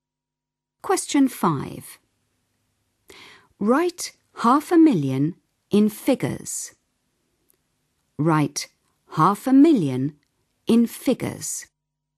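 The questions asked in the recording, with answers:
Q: Write 500,000 in figures.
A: 500000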